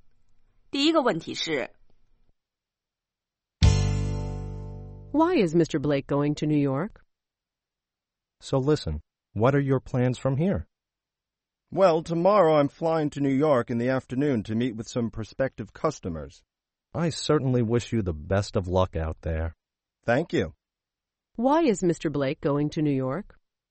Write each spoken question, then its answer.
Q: Why is Mr. Blake going to New York?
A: He's going there to meet with some prospective customers.